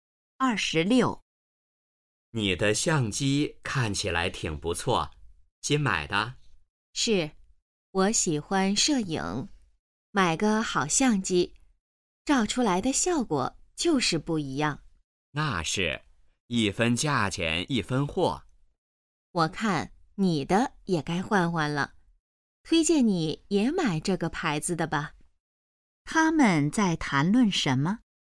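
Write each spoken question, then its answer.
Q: 他们在谈论什么?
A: 相机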